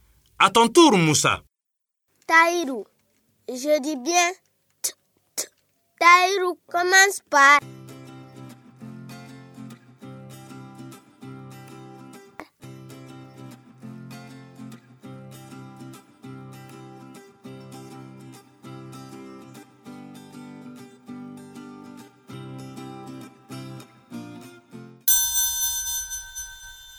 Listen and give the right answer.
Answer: Bravo les élèves. Taïrou commence par T.